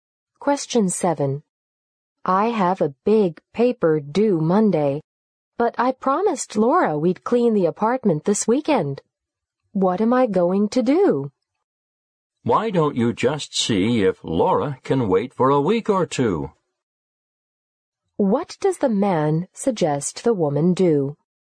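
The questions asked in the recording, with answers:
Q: What does the man suggest the woman do?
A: Ask Laura if the cleaning can wait a week or two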